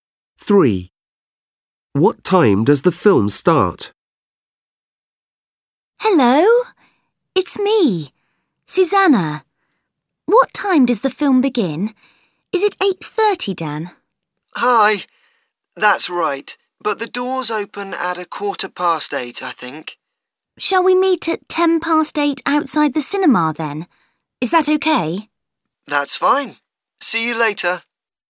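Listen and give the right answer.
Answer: 8:30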